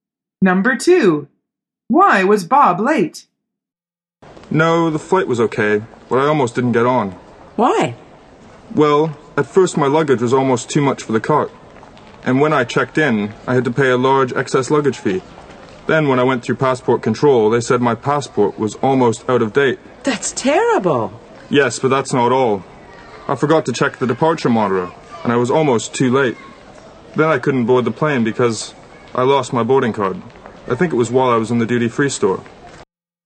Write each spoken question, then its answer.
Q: Why was Bob late?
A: The answer is, he forgot to check the departure monitor.